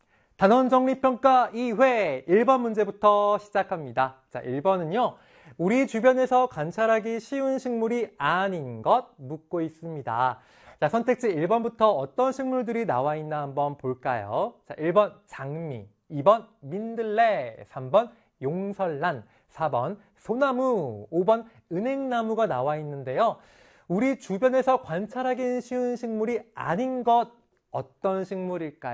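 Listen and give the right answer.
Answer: 3: 용설란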